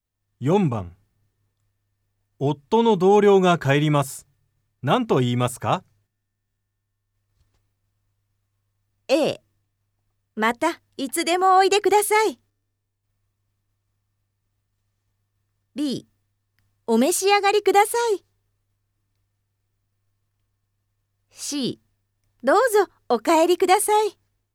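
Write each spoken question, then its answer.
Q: 夫の同僚が帰ります。何と言いますか?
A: A: またいつでもおいでください。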